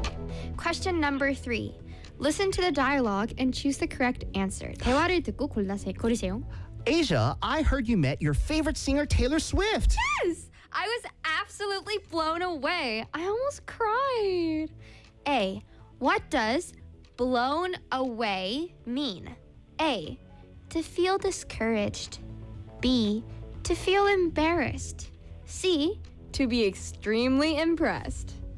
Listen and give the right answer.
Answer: C입니다.